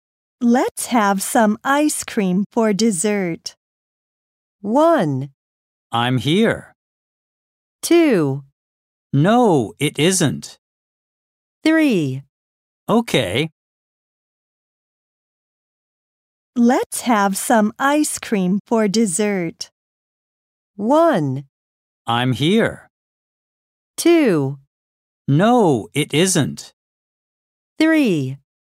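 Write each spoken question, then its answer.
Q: Let's have some ice cream for dessert.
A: 3: Okay.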